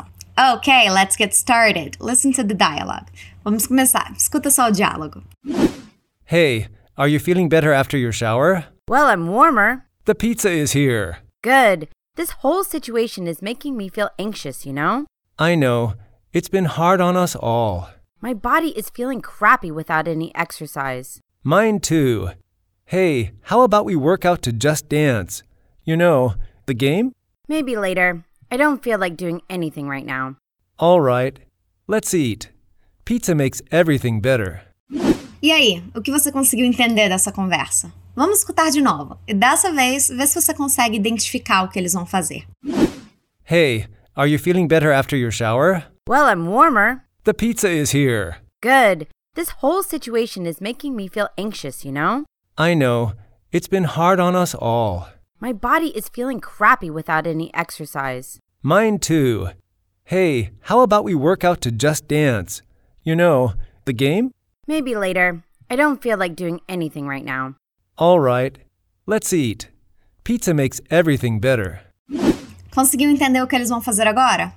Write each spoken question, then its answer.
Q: Conseguiu entender o que eles vão fazer agora?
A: eles vão comer uma pizza, o que é sempre uma boa ideia, na minha opinião.